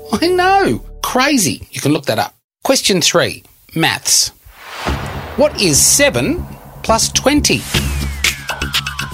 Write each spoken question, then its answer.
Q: What is 7 plus 20?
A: 27.